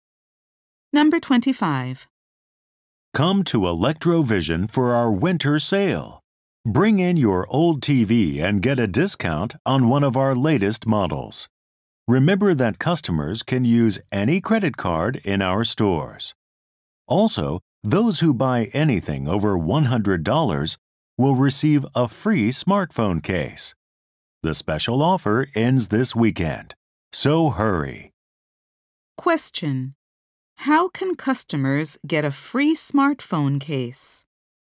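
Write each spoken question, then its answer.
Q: How can customers get a free smartphone case?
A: By buying anything over $100.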